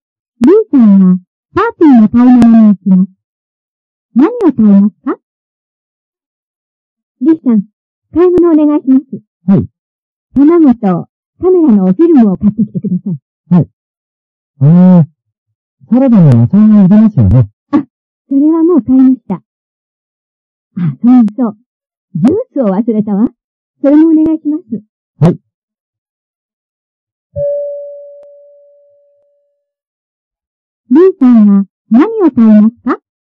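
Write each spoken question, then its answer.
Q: リーさんは何を買いますか?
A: 卵とカメラのフィルムとジュース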